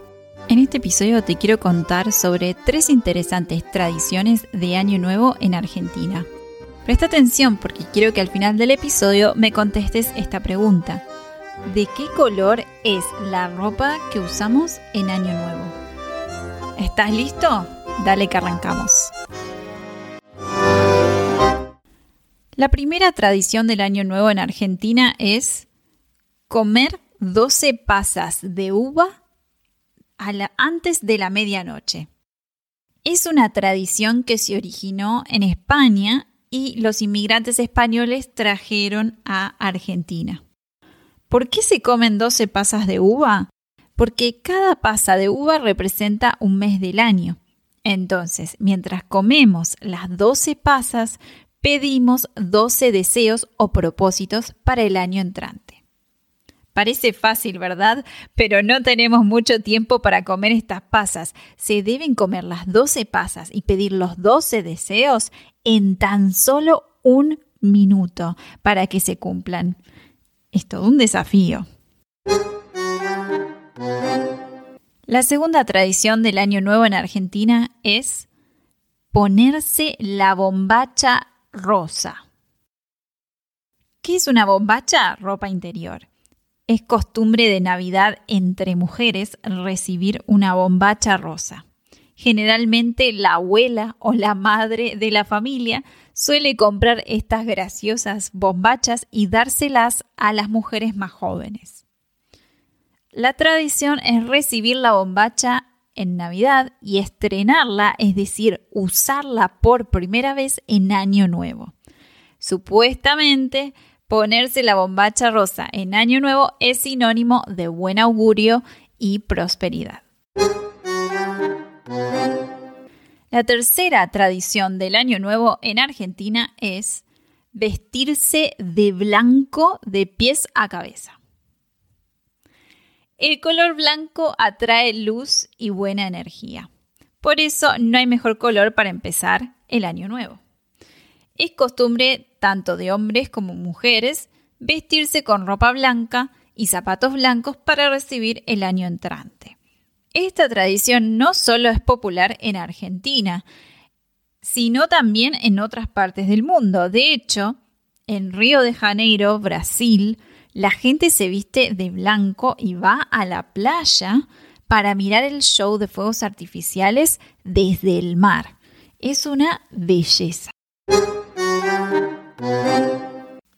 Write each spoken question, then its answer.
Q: ¿De qué color es la ropa que usamos en Año Nuevo?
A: vestirse con ropa de color blanco